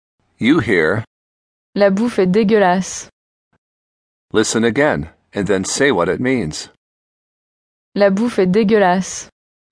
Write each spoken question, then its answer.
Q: Listen again, and then say what it means.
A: The food is lousy.